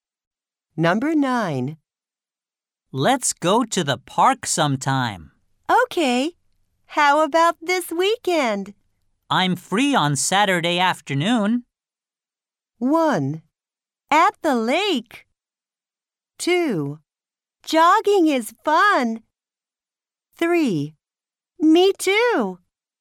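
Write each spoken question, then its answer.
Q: I'm free on Saturday afternoon.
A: 3: Me too.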